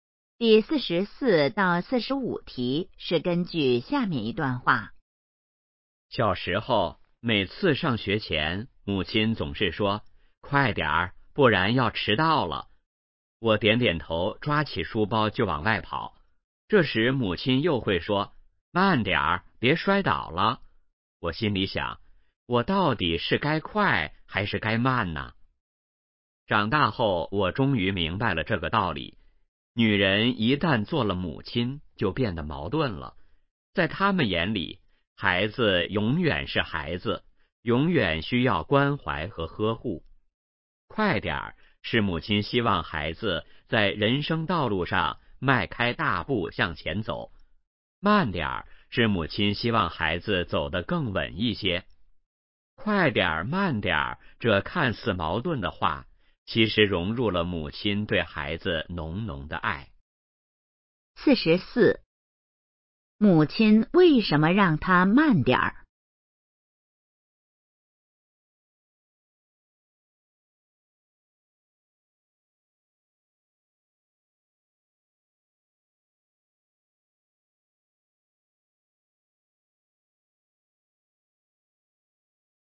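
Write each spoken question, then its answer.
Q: 母亲为什么让他慢点儿?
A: 希望孩子走得更稳,别摔倒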